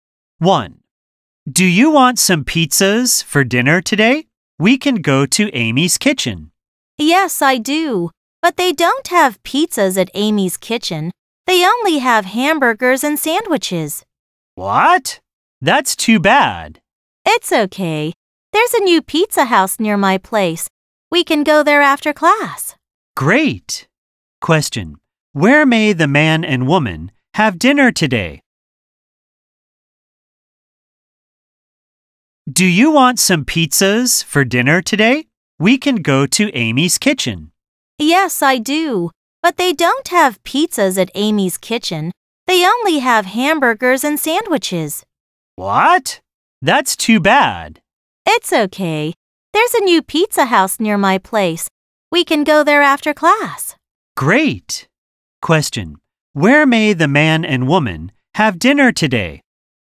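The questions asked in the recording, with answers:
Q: Where may the man and woman have dinner today?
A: At the new pizza house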